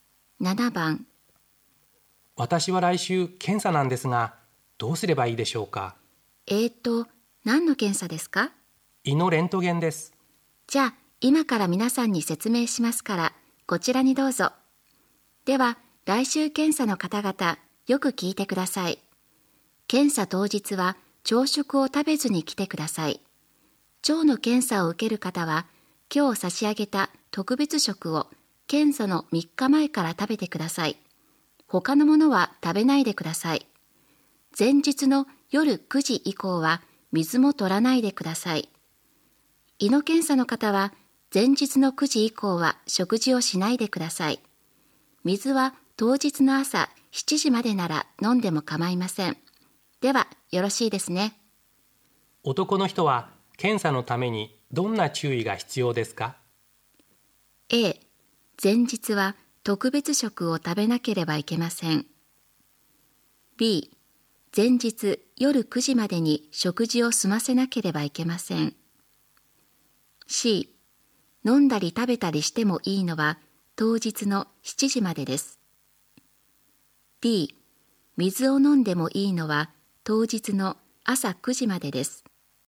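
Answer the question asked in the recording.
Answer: B: 前日夜9時までに食事を済ませなければいけません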